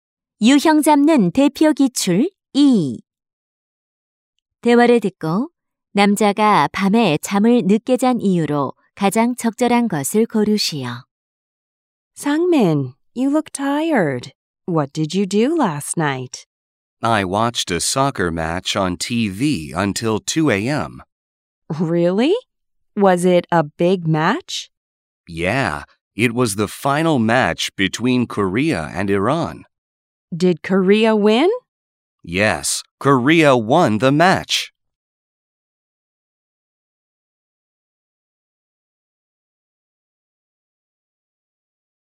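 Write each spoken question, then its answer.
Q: 대화를 듣고 남자가 밤에 잠을 늦게 잔 이유로 가장 적절한 것을 고르시오.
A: 새벽 2시까지 TV로 축구 경기를 봐서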